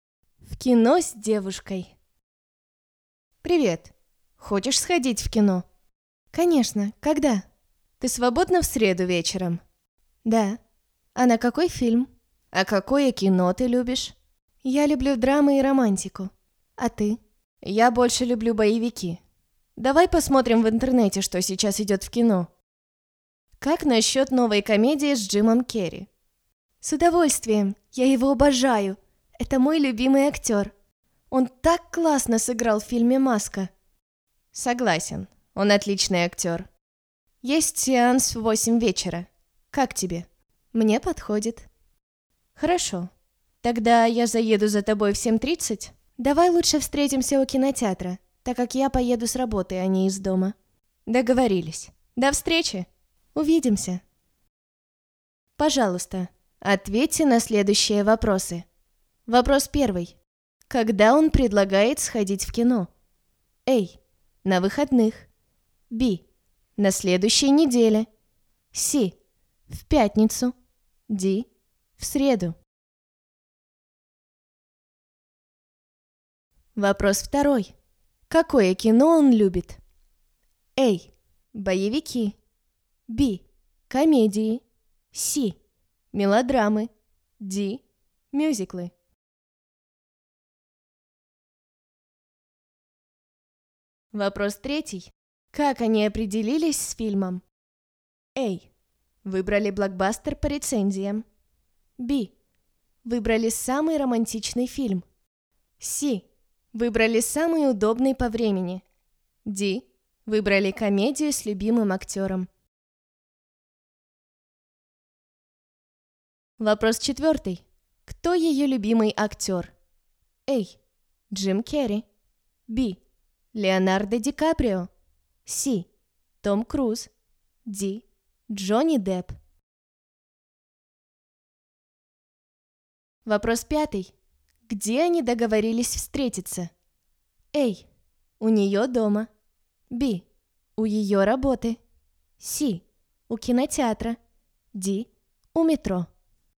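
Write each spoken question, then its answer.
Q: Когда он предлагает сходить в кино?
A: D: В среду.

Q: Какое кино он любит?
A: A: Боевики.

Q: Как они определились с фильмом?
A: Д: Выбрали комедию с любимым актером.

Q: Кто ее любимый актер?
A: А: Джим Керри.

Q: Где они договорились встретиться?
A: С: У кинотеатра.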